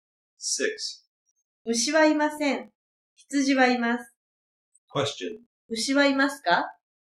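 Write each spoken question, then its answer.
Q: 牛はいますか?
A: いいえ、いません。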